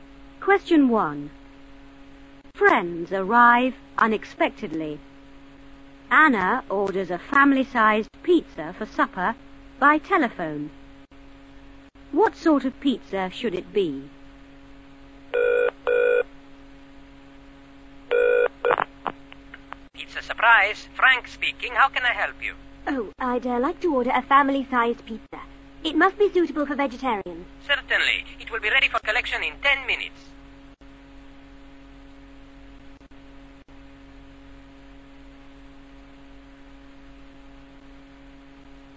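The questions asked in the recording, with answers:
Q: What sort of pizza should it be?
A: Family-sized and suitable for vegetarians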